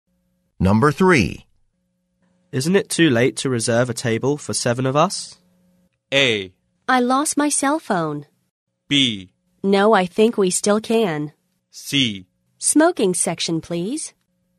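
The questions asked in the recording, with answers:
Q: Isn't it too late to reserve a table for 7 of us?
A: B: No, I think we still can.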